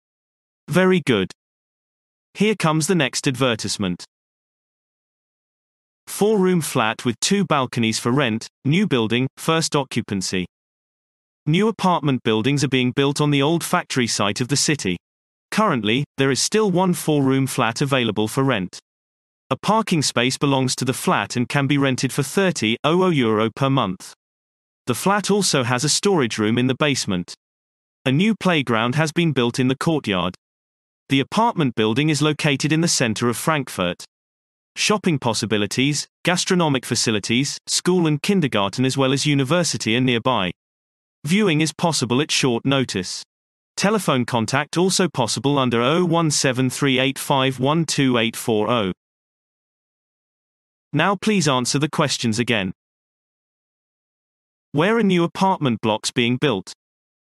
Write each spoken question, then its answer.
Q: Where are new apartment blocks being built?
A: Answer. The apartment buildings are being built on the old factory site in the city.